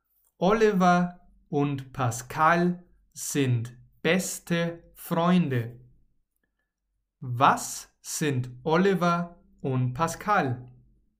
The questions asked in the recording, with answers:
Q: Was sind Oliver und Pascal?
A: Beste Freunde. Sie sind beste Freunde.